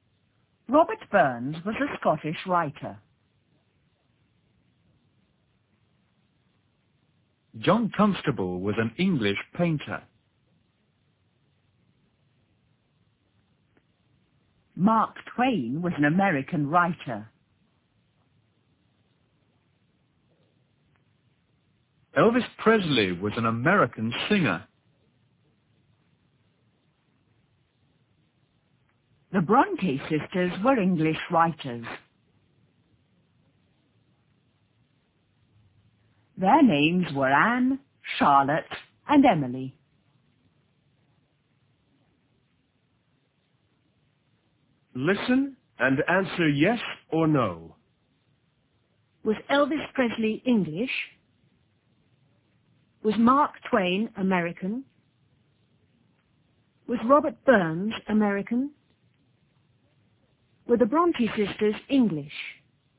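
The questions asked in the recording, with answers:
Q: Was Mark Twain American?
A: Yes

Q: Was Robert Burns American?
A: No

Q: Were the Bronte sisters English?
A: Yes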